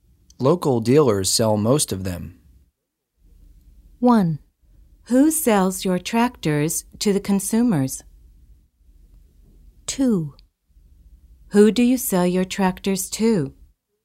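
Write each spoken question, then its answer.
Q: Local dealers sell most of them.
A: 1: Who sells your tractors to the consumers?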